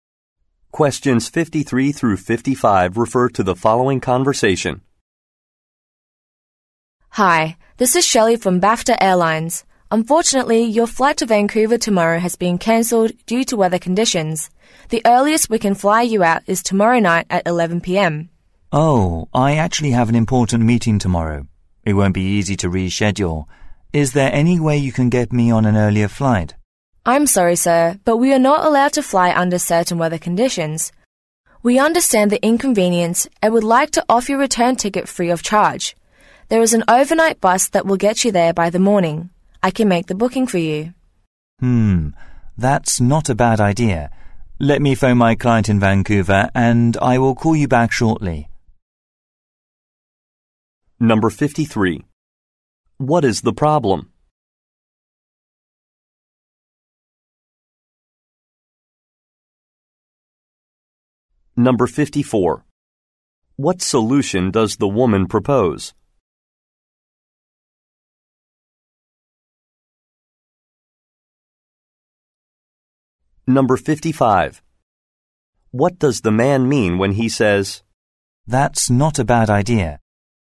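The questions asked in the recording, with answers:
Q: What is the problem?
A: A flight was cancelled due to weather

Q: What solution does the woman propose?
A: Taking an overnight bus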